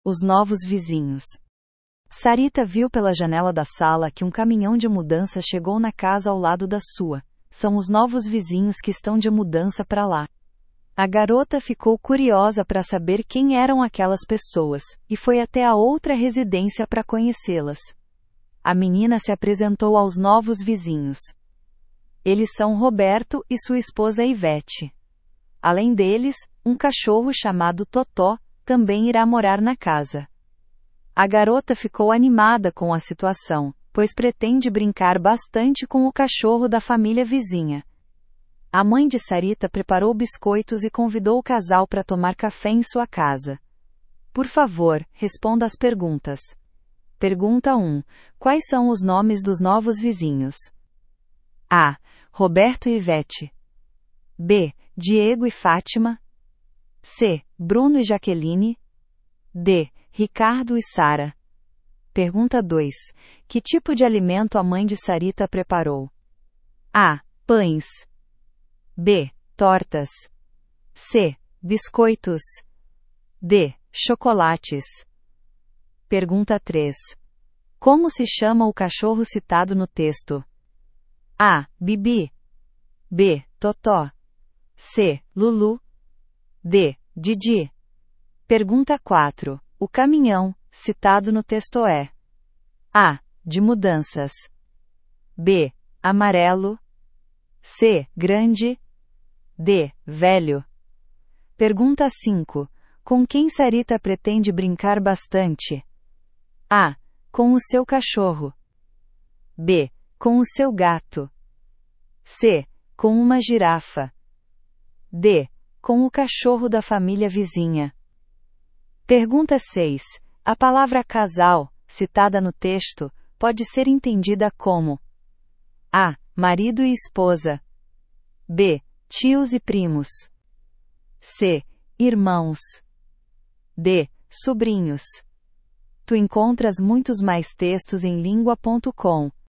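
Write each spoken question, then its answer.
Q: Quais são os nomes dos novos vizinhos?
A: A: Roberto e Ivete

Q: Que tipo de alimento a mãe de Sarita preparou?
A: C: Biscoitos

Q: Como se chama o cachorro citado no texto?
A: B: Totó

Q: O caminhão, citado no texto é?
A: A: De mudanças

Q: Com quem Sarita pretende brincar bastante?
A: D: Com o cachorro da família vizinha

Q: A palavra casal, citada no texto, pode ser entendida como?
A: A: Marido e esposa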